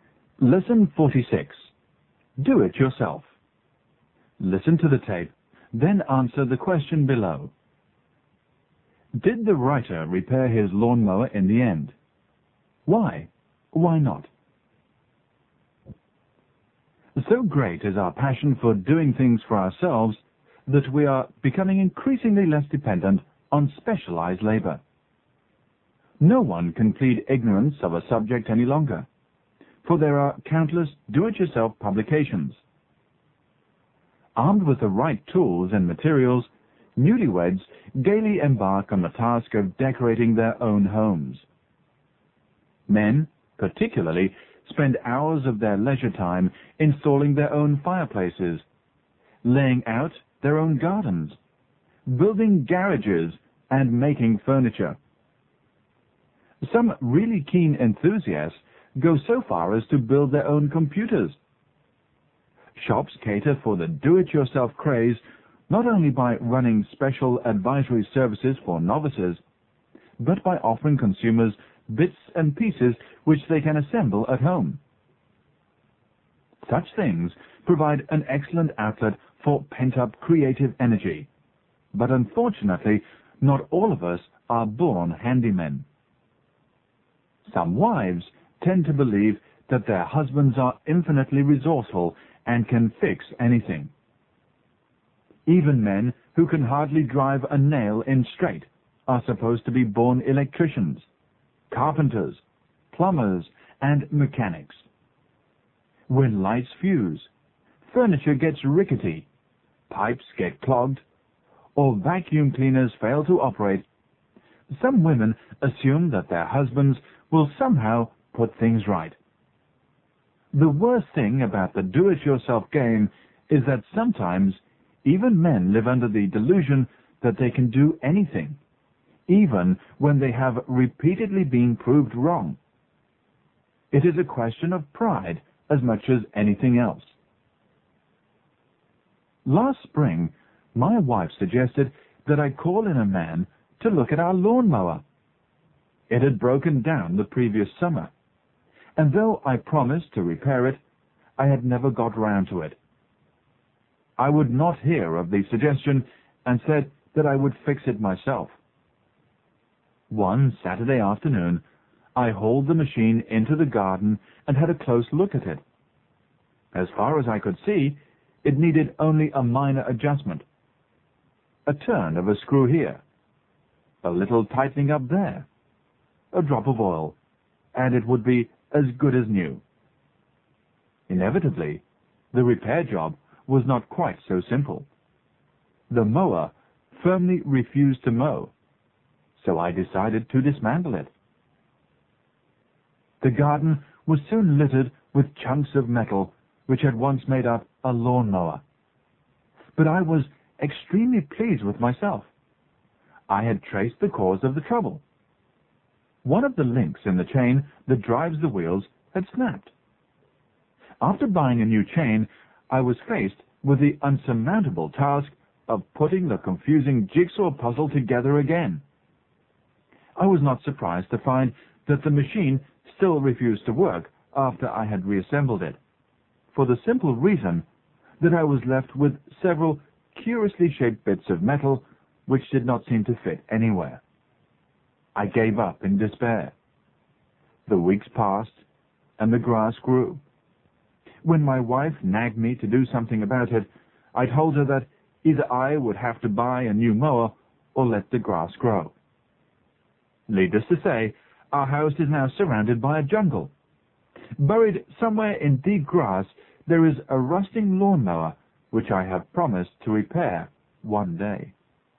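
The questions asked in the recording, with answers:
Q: Did the writer repair his lawnmower in the end? Why? Why not?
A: No, he couldn't reassemble it because several pieces didn't fit anywhere, so he gave up.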